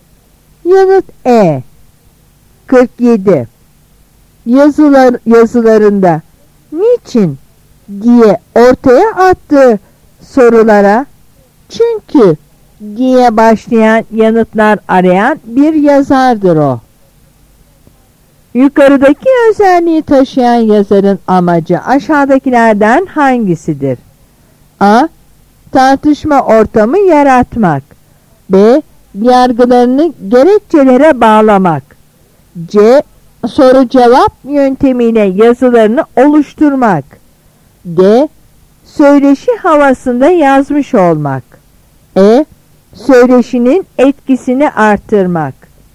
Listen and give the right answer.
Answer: Yanıt B.